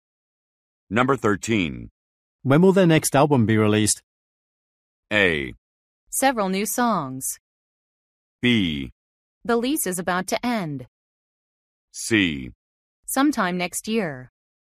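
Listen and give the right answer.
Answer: C: Sometime next year.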